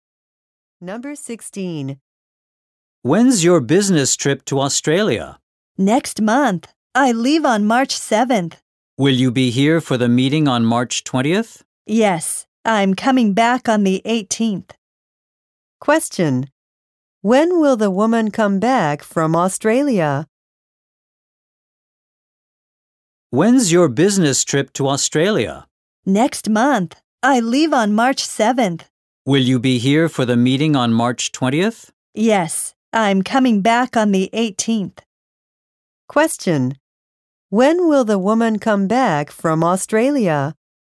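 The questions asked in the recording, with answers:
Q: When will the woman come back from Australia?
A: On March 18th.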